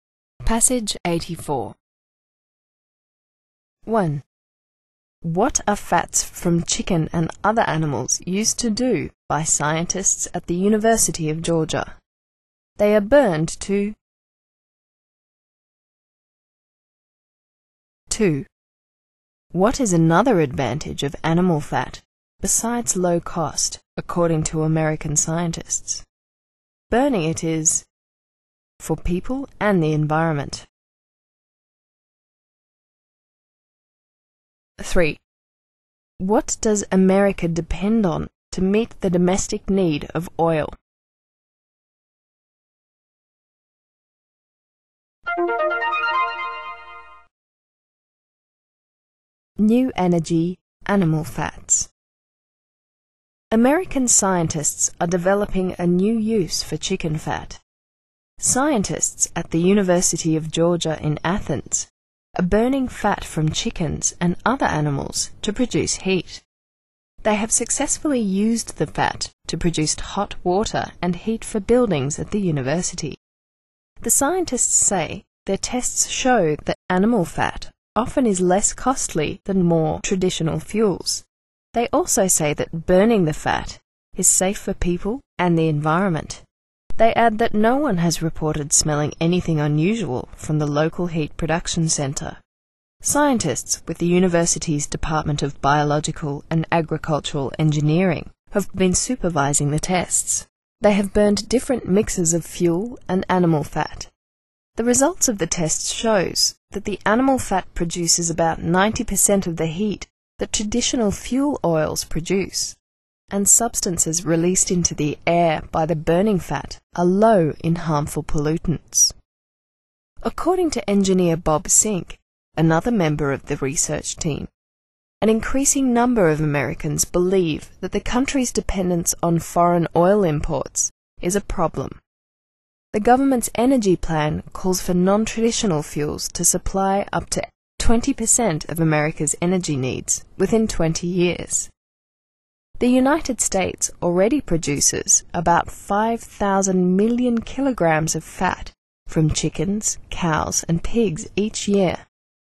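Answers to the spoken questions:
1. produce heat (hot water and heat for buildings)
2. burning it is safe for people and the environment
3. foreign oil imports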